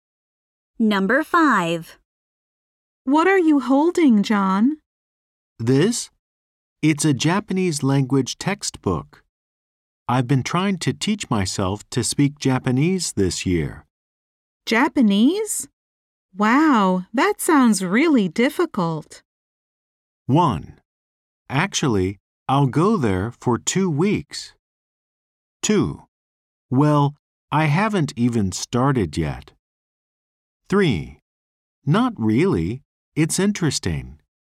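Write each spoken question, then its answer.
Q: Japanese? Wow, that sounds really difficult.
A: 3: Not really. It's interesting.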